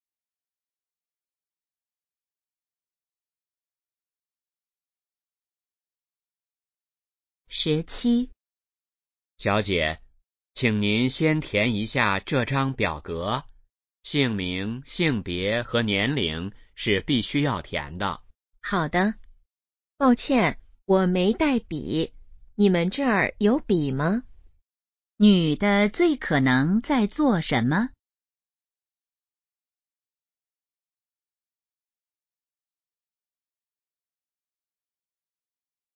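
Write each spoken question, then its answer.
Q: 女的最可能在做什么?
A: 填表格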